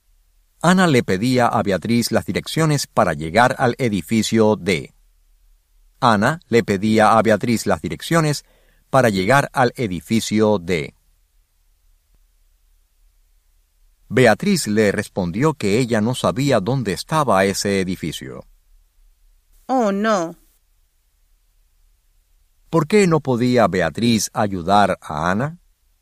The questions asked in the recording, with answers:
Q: ¿Por qué no podía Beatriz ayudar a Ana?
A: Beatriz no podía ayudar a Ana porque ella no sabía dónde estaba ese edificio.